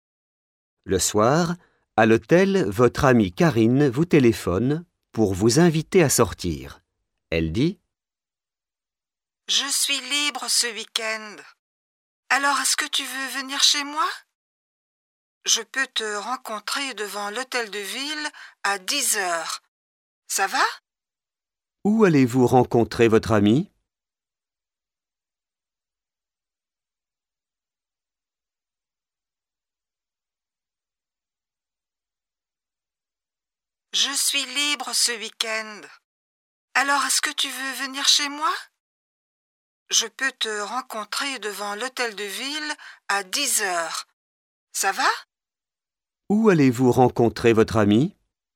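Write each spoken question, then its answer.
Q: Où allez-vous rencontrer votre ami?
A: Devant l'hôtel de ville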